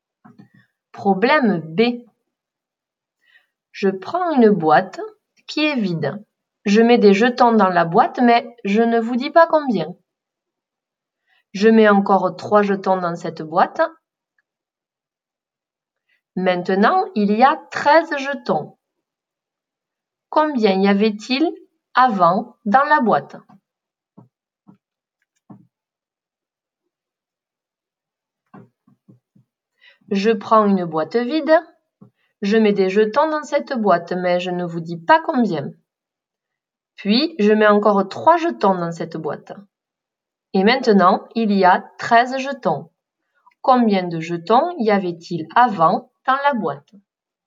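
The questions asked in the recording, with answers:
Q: Combien de jetons y avait-il avant dans la boîte?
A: 10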